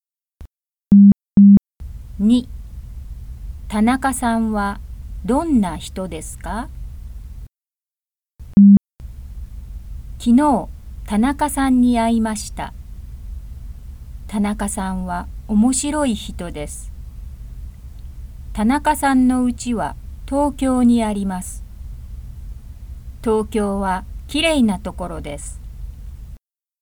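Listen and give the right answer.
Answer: 面白い人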